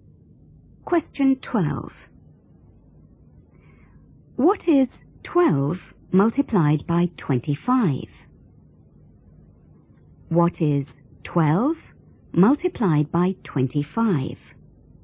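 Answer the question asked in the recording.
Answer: 300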